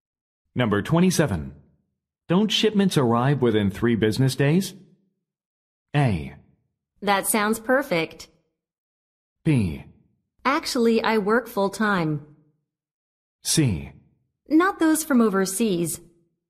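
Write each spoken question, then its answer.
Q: Don't shipments arrive within 3 business days?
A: C: Not those from overseas.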